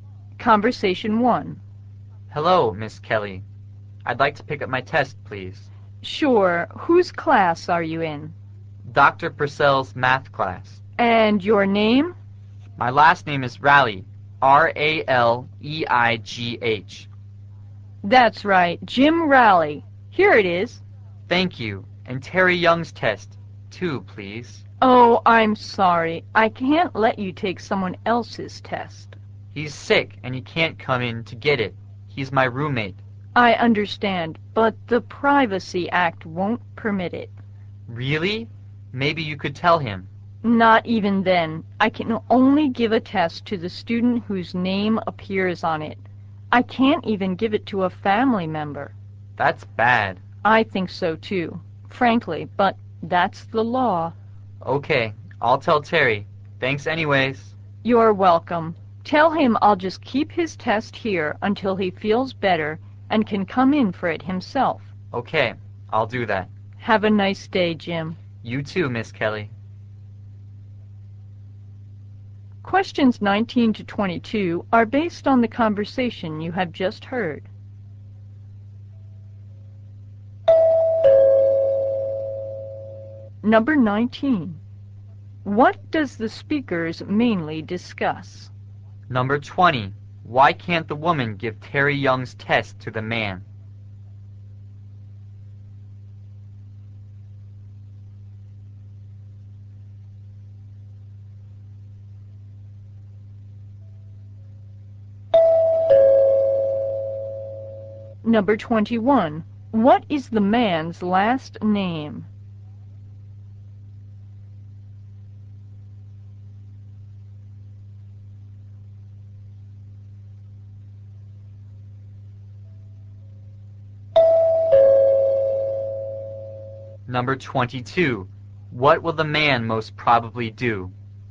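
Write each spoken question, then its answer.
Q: What does the speakers mainly discuss?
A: Picking up a test, and why the woman can't give out someone else's

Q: Why can't the woman give Terry Young's test to the man?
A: The Privacy Act doesn't allow it

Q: What is the man's last name?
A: Raleigh

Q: What will the man most probably do?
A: Tell Terry to come for his test himself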